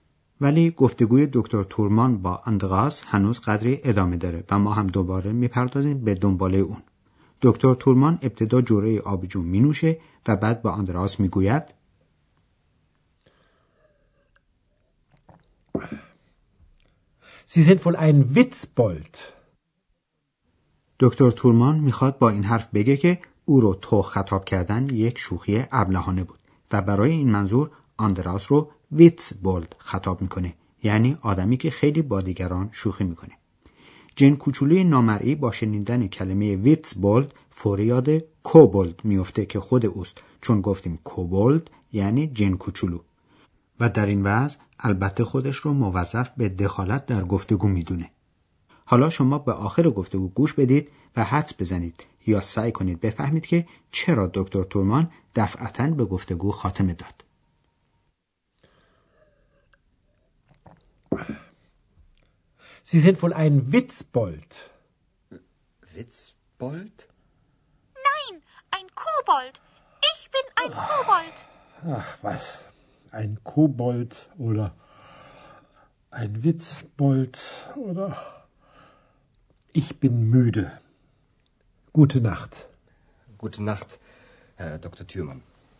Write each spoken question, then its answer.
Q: حدس بزنید یا سعی کنید بفهمید که چرا دکتر تورمان دفعتا به گفتگو خاتمه داد.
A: جواب سوال قبلی ما این است که دکتر تورمان به گفتگو خاتمه داد چون موده یعنی خسته بود.